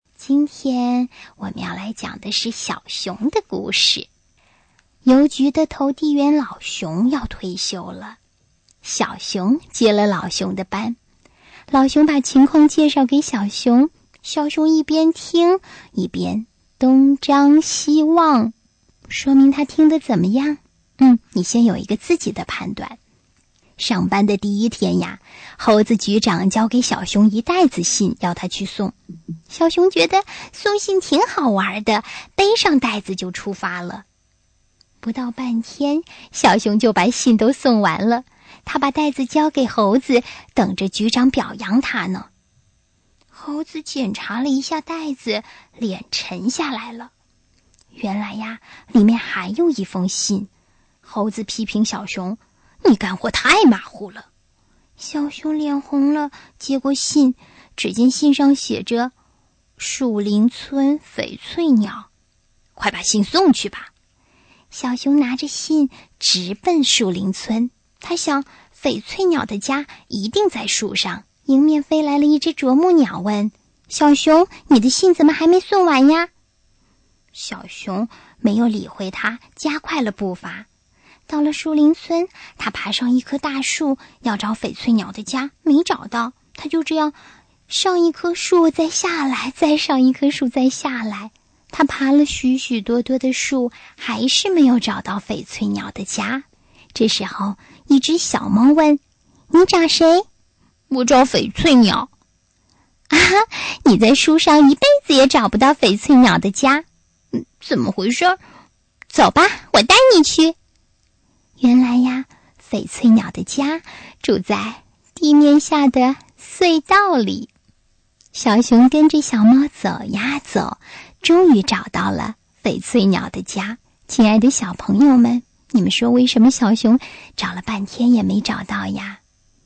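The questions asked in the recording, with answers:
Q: 亲爱的小朋友们,你们说为什么小熊找了半天也没找到呀?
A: 因为老熊介绍情况时,小熊一边听一边东张西望,没有认真听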